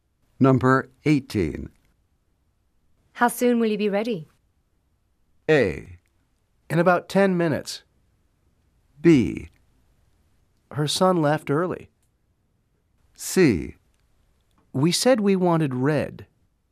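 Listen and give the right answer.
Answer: A: In about 10 minutes.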